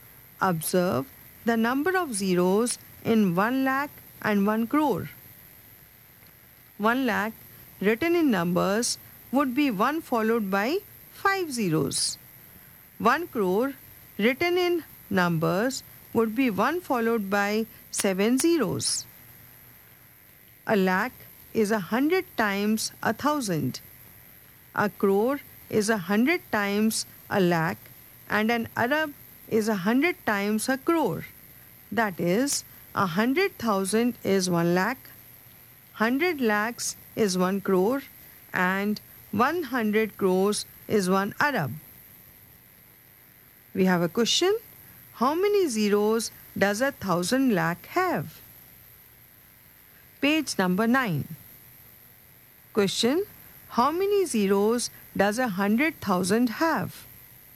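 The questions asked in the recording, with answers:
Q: How many zeros does 100,000 have?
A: 5 zeros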